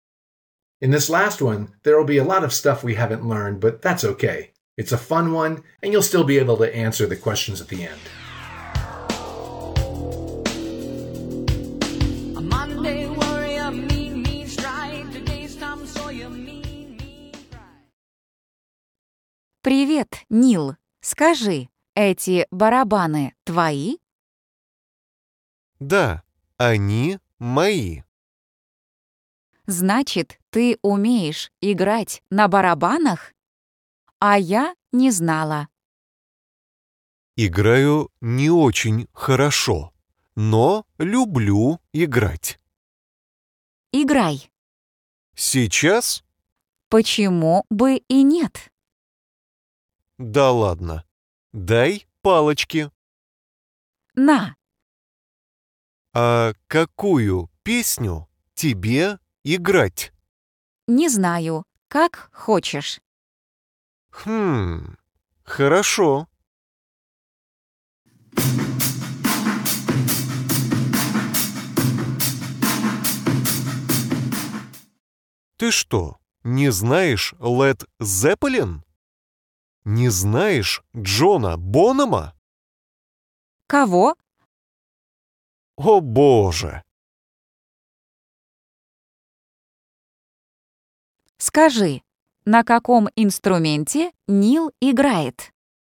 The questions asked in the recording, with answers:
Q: Скажи, на каком инструменте Нил играет?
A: На барабанах.